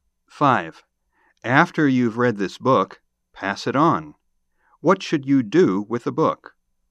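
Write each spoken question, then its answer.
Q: What should you do with the book?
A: Pass it on to someone else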